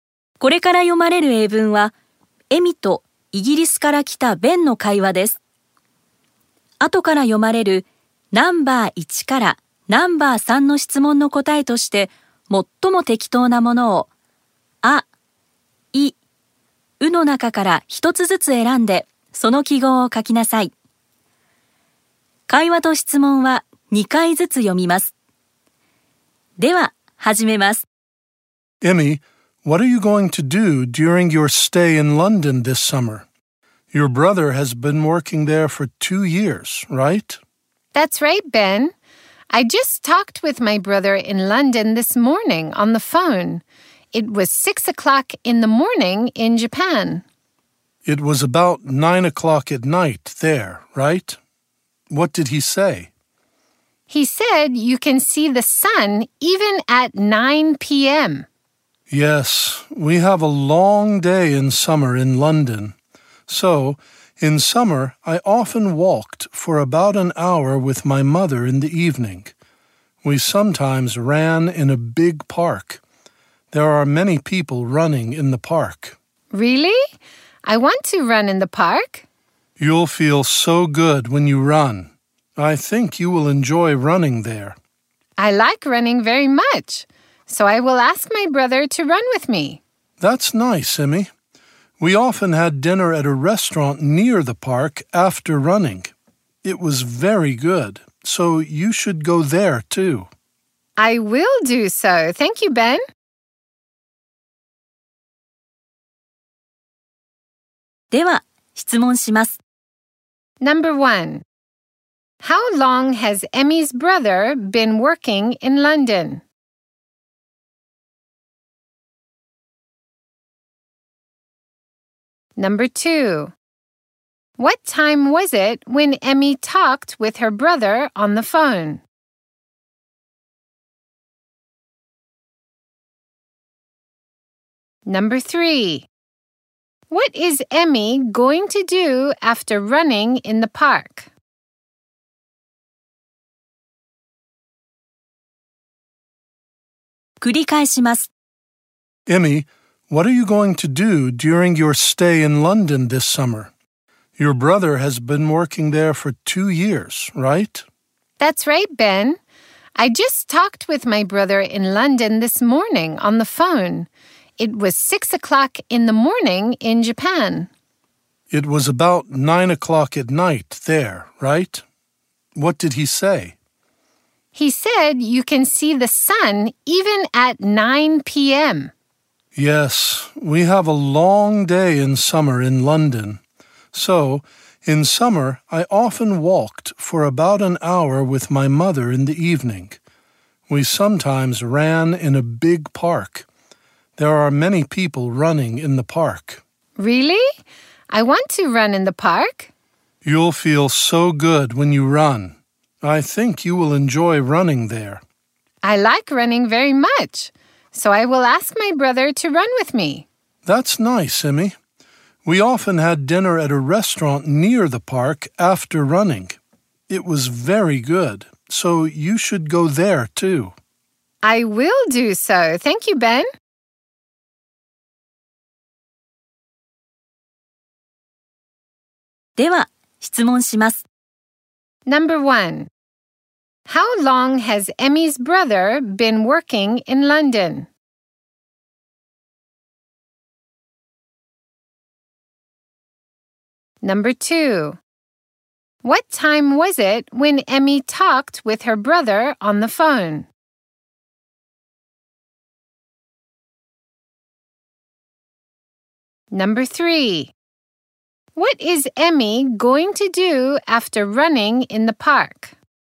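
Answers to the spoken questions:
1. For two years
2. 6 o'clock in the morning in Japan (about 9 p.m. in London)
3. Have dinner at a restaurant near the park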